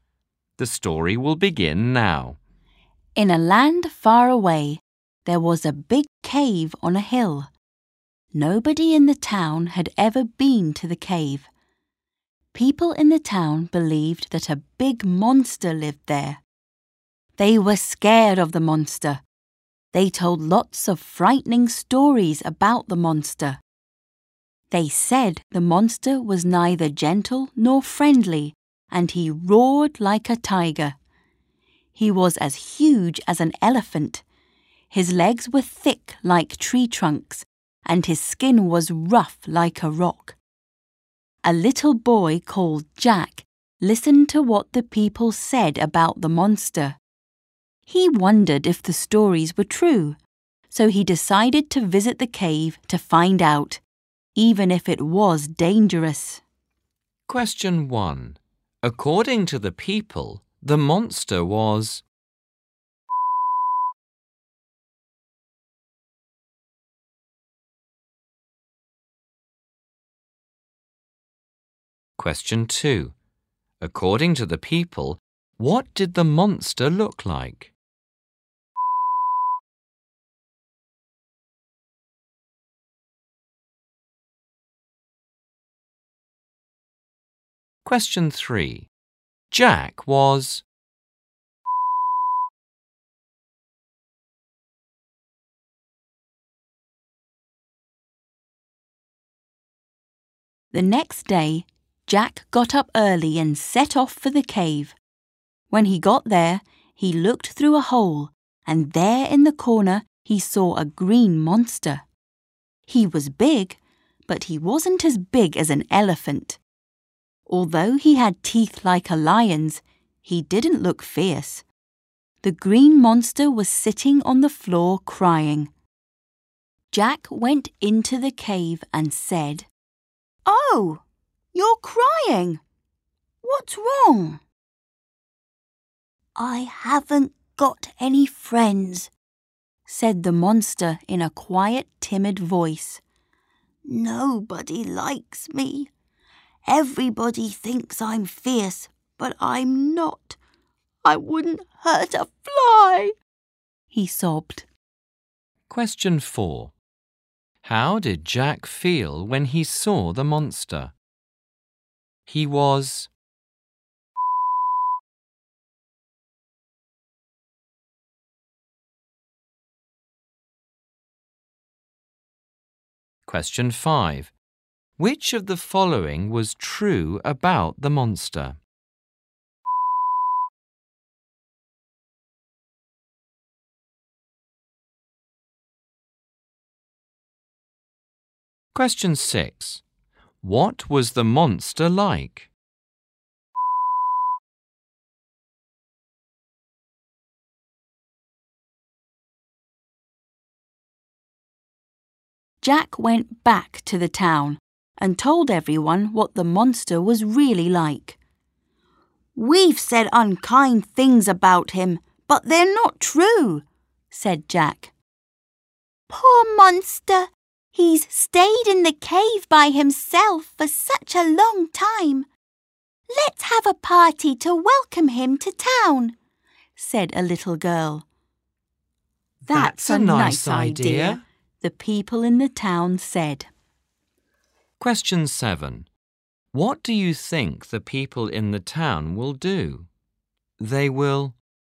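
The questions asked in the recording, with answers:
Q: According to the people, the monster was...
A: neither gentle nor friendly (fierce)

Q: According to the people, what did the monster look like?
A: As huge as an elephant, with legs thick like tree trunks and skin rough like a rock

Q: What was the monster like?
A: Quiet, timid and gentle; lonely

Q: What do you think the people in the town will do?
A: Have a party to welcome the monster to town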